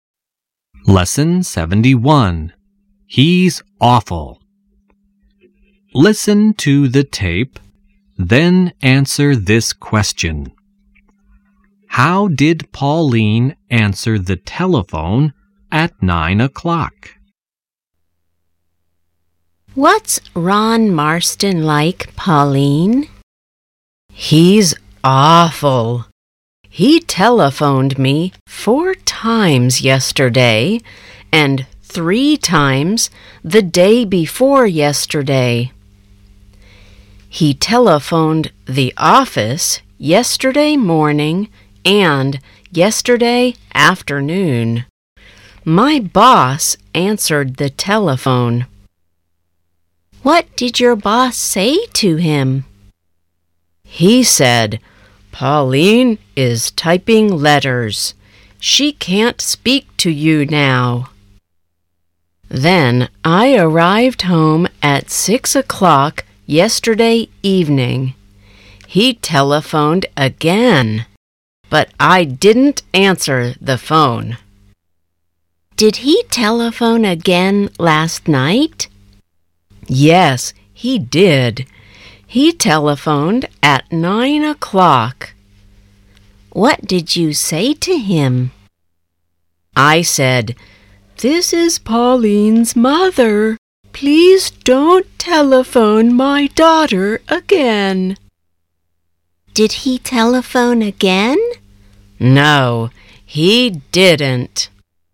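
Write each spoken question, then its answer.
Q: How did Pauline answer the telephone at 9 o'clock?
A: She said, "This is Pauline's mother. Please don't telephone my daughter again."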